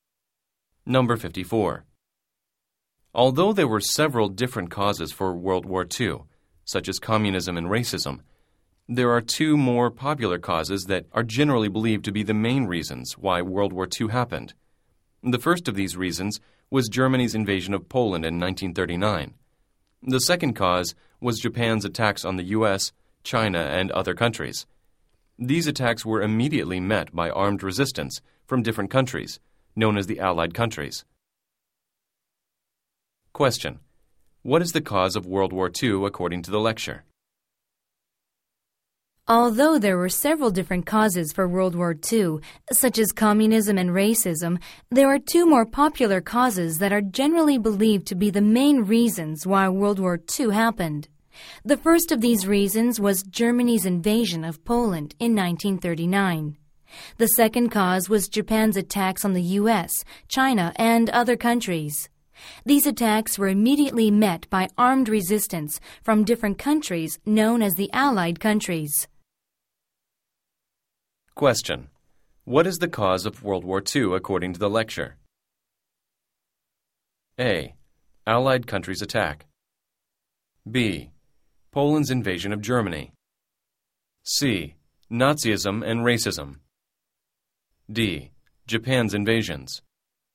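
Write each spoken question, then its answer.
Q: What is the cause of World War II according to the lecture?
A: D: Japan's invasions.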